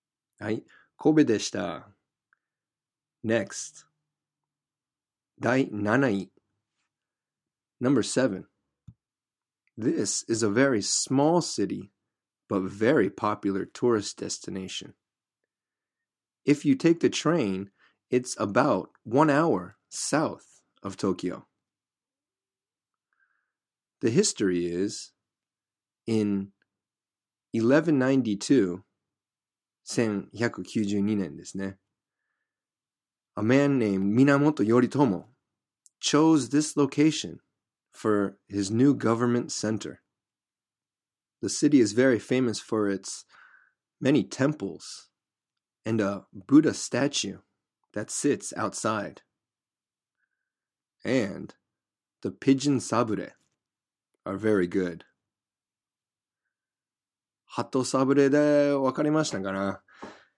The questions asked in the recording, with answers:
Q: Hato sabure de wakarimashita kana?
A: Yes, the answer is Kamakura.